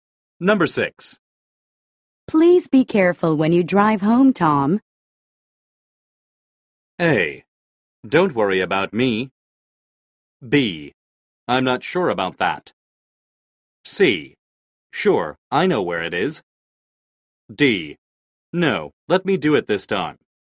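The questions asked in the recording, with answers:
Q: Please be careful when you drive home, Tom.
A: A: Don't worry about me.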